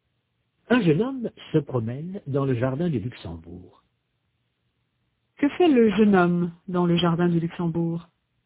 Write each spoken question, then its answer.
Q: Que fait le jeune homme dans le jardin du Luxembourg?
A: Il se promène.